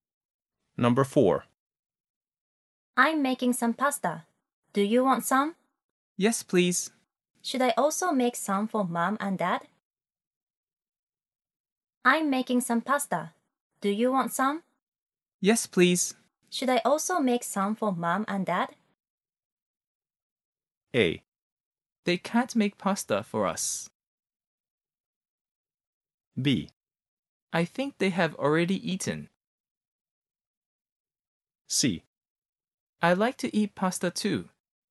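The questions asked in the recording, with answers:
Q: Should I also make some for mom and dad?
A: B: I think they have already eaten.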